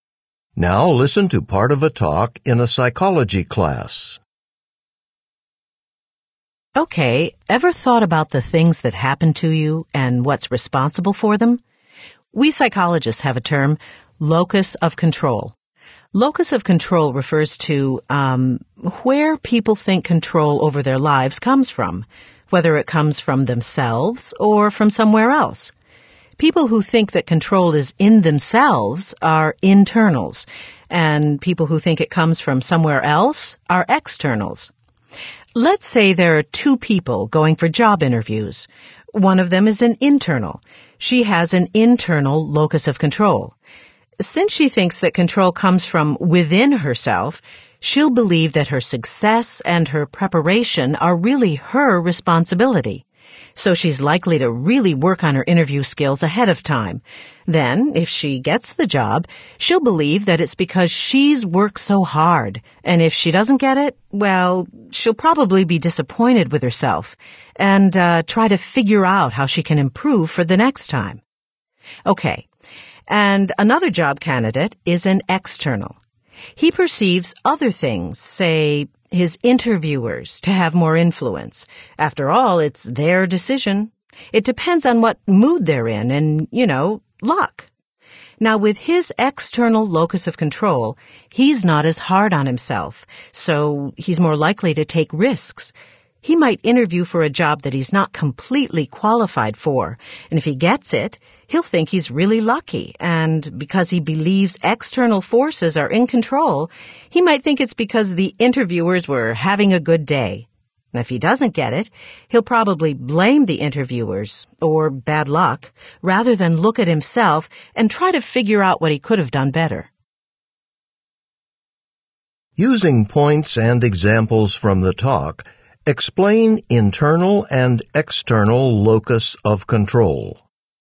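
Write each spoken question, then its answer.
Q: Using points and examples from the talk, explain internal and external locus of control.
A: Internals believe control comes from themselves (e.g., a job candidate who prepares hard, credits her effort for success, and tries to improve after failure); externals believe control comes from outside forces like interviewers or luck (e.g., a candidate who takes risks, credits luck for success, and blames others for failure).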